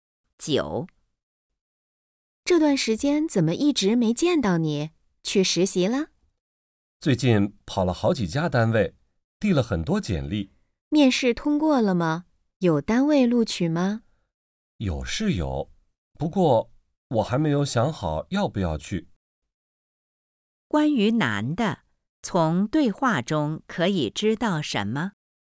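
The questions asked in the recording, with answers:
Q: 关于男的,从对话中可以知道什么?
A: 有单位录取了,但他还没想好要不要去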